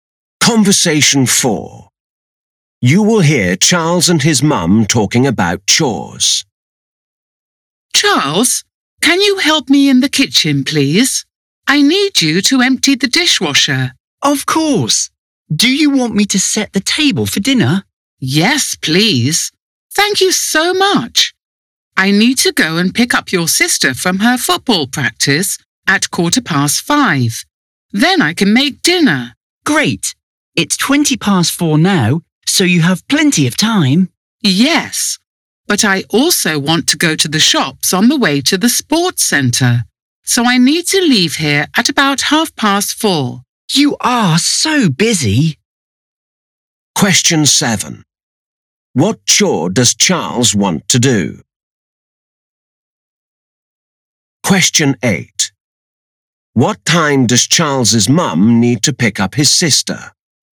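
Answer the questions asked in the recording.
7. Set the table for dinner
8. 5:15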